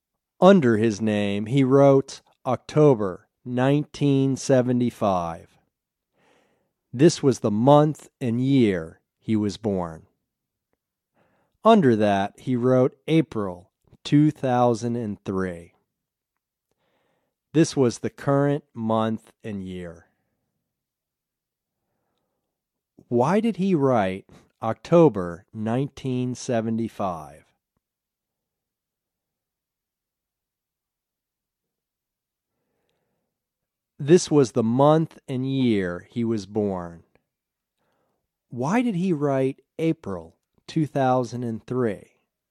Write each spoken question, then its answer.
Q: Why did he write October 1975?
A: This was the month and year he was born.

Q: Why did he write April 2003?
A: This was the current month and year.